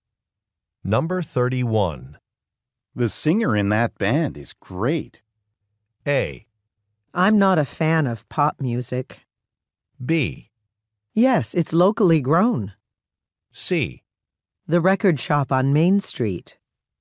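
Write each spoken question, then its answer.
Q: The singer in that band is great.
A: A: I'm not a fan of pop music.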